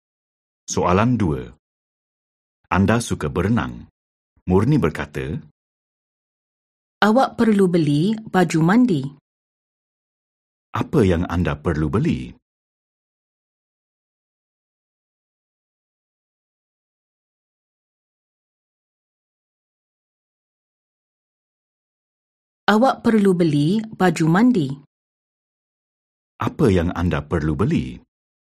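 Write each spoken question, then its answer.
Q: Apa yang anda perlu beli?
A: baju mandi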